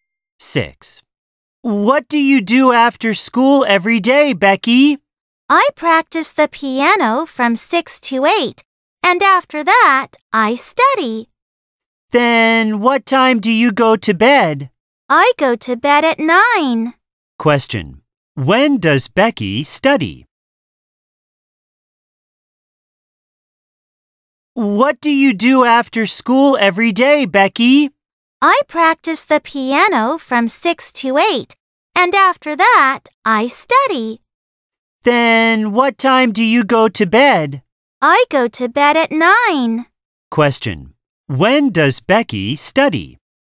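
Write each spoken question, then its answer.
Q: When does Becky study?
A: From 8 to 9 (after piano).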